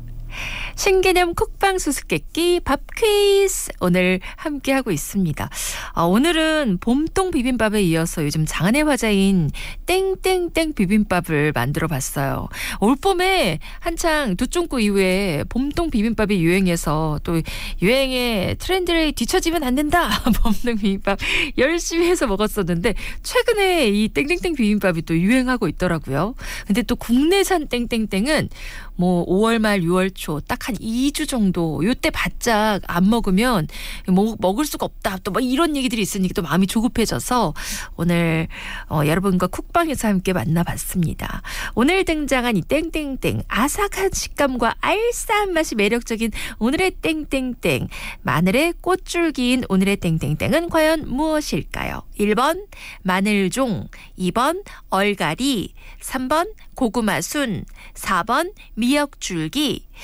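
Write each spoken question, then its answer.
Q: 오늘 등장한 이 땡땡땡 아삭한 식감과 알싸한 맛이 매력적인 오늘의 땡땡땡 마늘의 꽃줄기인 오늘의 땡땡땡은 과연 무엇일까요?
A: 1: 마늘종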